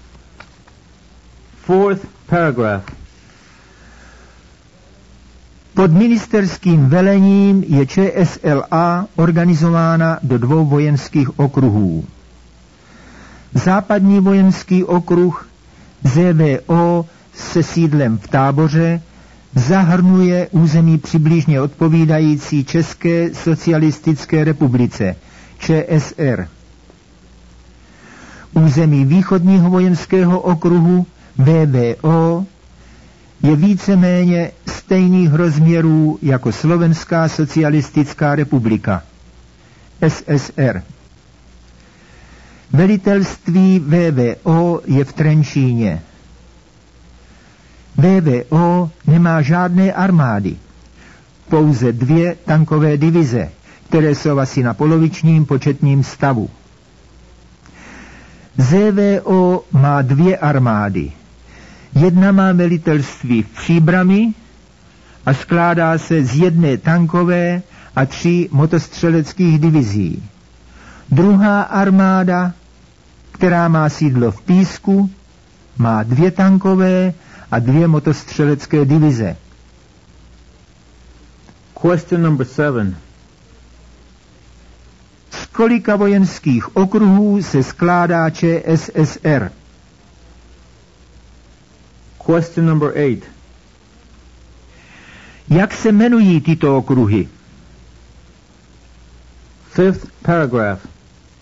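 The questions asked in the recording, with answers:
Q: Z kolika vojenských okruhů se skládá ČSSR?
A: Ze dvou

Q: Jak se jmenují tyto okruhy?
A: Západní vojenský okruh (ZVO) a východní vojenský okruh (VVO)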